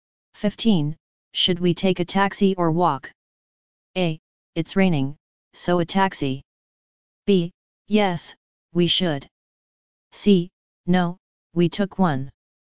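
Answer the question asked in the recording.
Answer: A: It's raining, so a taxi.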